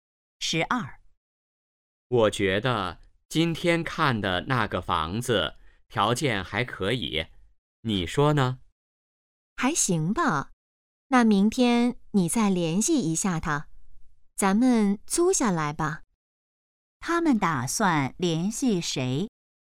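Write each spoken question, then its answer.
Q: 他们打算联系谁?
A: 房东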